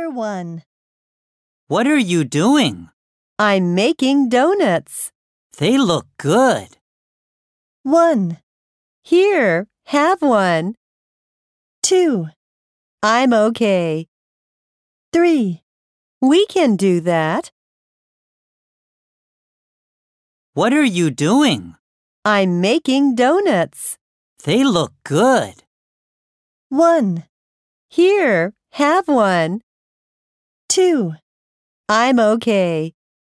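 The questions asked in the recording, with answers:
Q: They look good.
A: 1: Here, have one.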